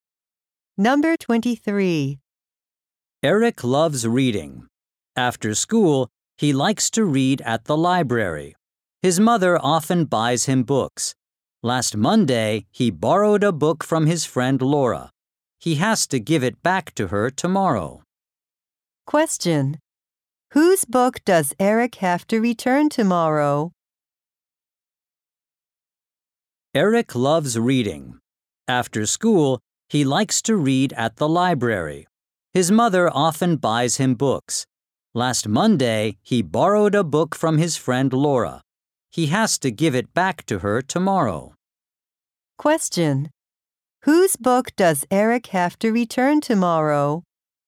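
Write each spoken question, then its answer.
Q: Whose book does Eric have to return tomorrow?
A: Laura's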